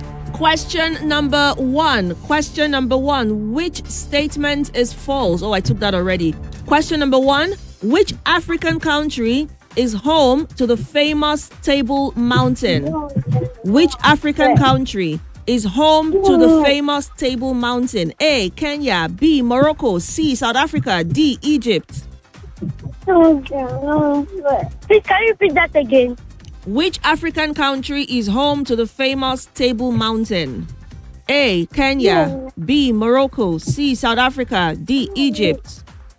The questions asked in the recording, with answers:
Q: Which African country is home to the famous Table Mountain?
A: The answer was South Africa.